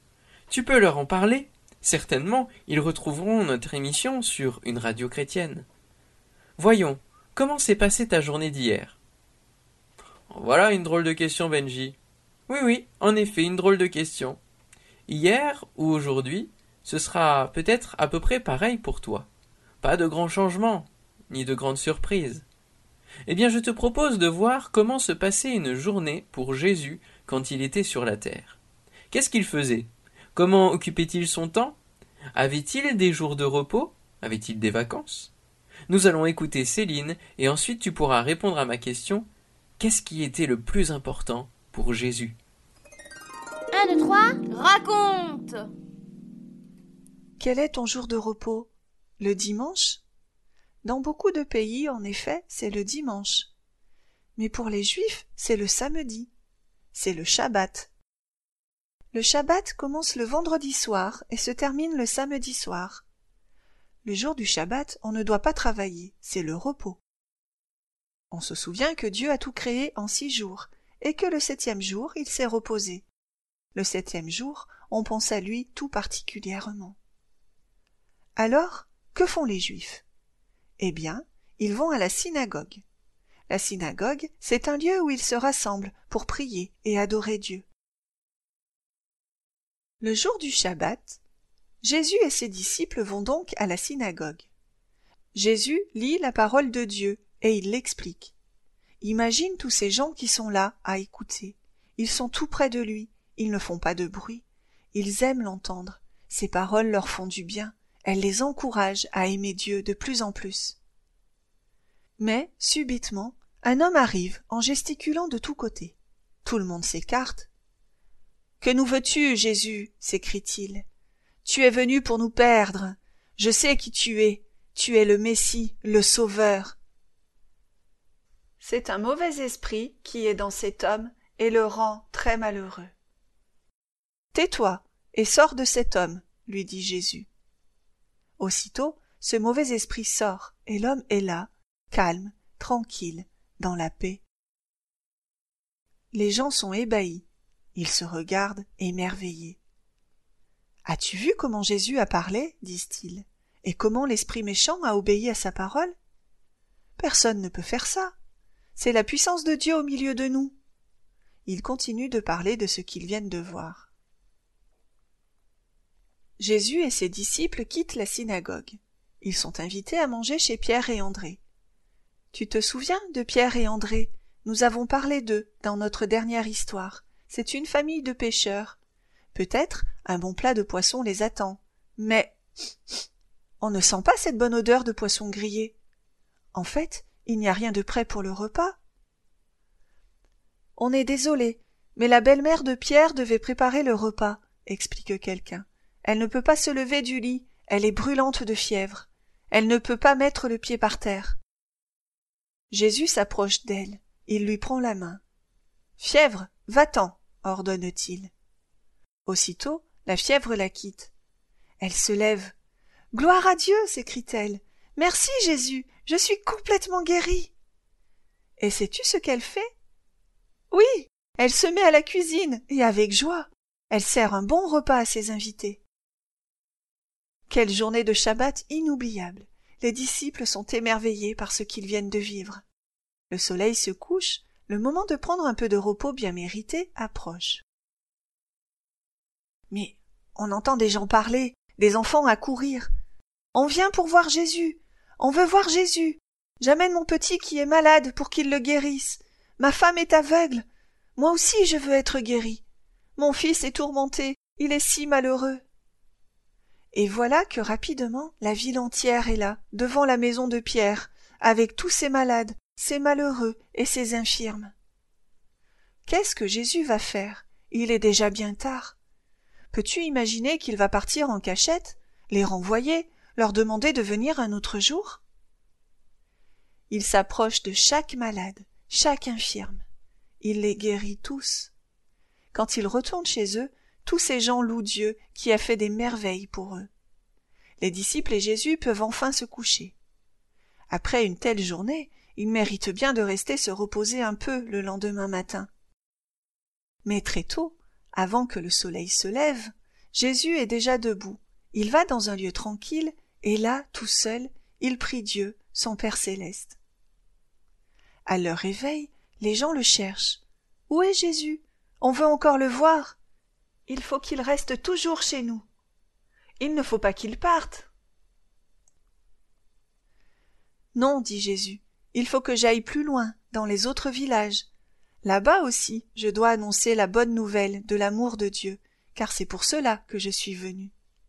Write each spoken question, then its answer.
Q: Qu'est-ce qui était le plus important pour Jésus?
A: Car pour lui, ce qui est le plus important, c'est de nous faire du bien, de faire du bien aux hommes pour qu'ils sachent que Dieu les aime.